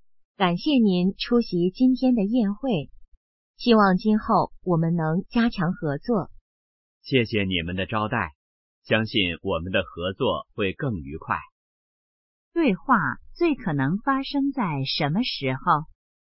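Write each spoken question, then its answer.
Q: 对话最可能发生在什么时候?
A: 宴会上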